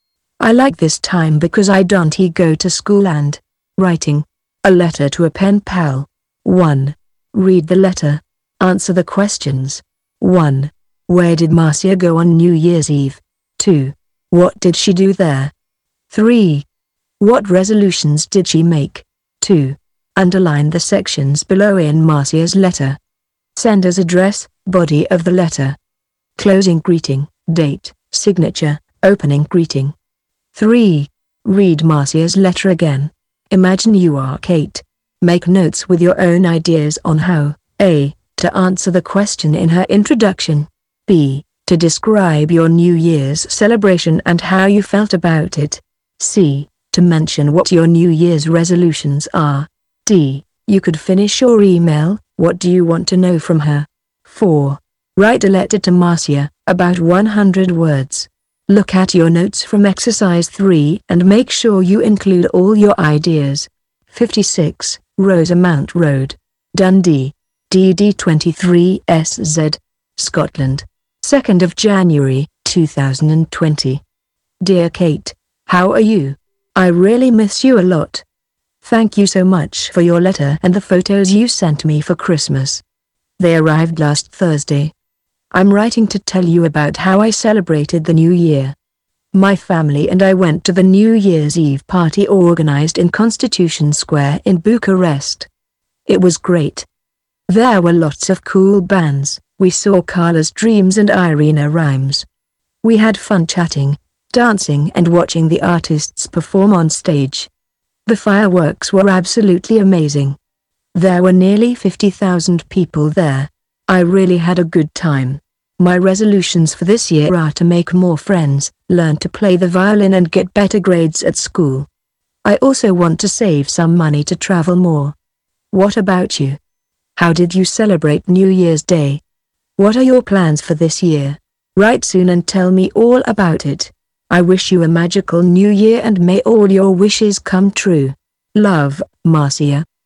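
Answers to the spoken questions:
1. To the New Year's Eve party in Constitution Square in Bucharest
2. She chatted, danced and watched the artists perform on stage and the fireworks
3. To make more friends, learn to play the violin, get better grades at school and save money to travel more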